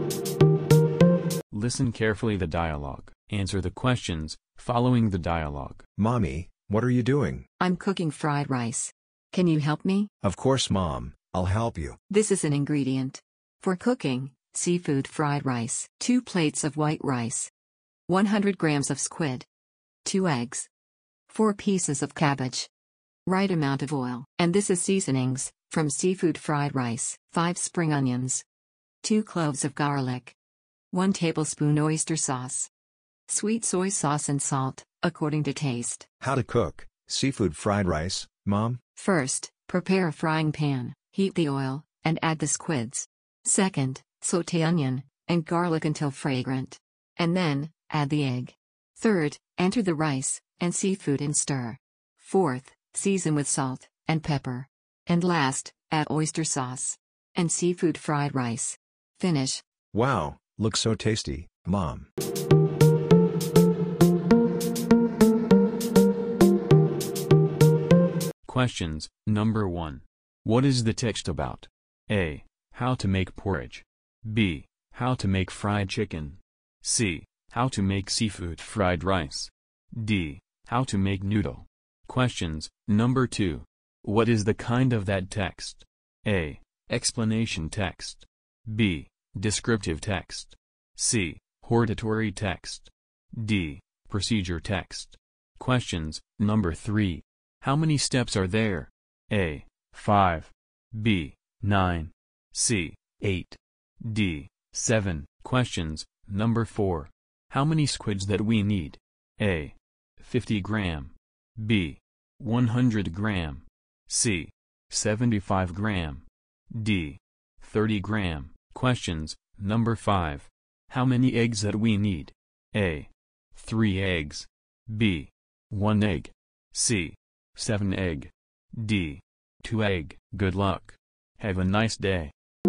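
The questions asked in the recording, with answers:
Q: What is the text about?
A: C: How to make seafood fried rice.

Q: What is the kind of that text?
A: D: Procedure text.

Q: How many steps are there?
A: A: 5.

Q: How many squids that we need?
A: B: 100 gram.

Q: How many eggs that we need?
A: D: 2 egg.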